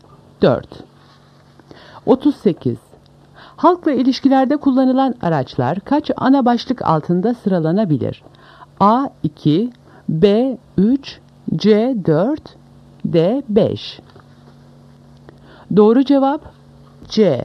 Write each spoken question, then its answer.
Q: Halkla ilişkilerde kullanılan araçlar kaç ana başlık altında sıralanabilir?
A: Doğru cevap C. 4.